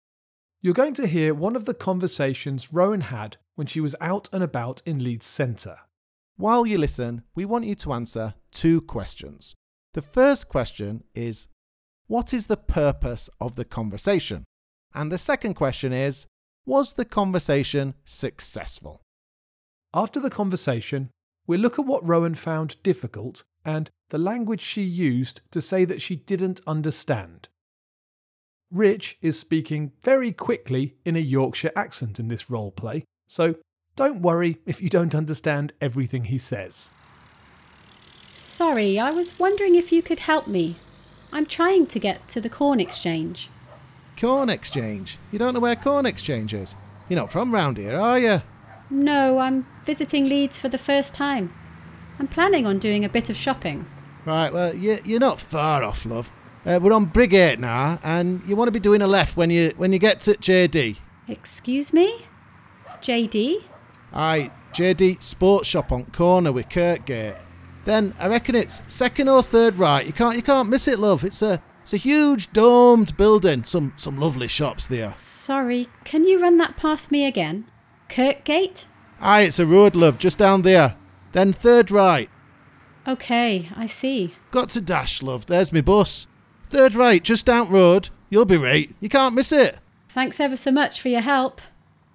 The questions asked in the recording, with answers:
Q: The first question is, what is the purpose of the conversation?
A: Okay, the purpose of the conversation was to ask for directions.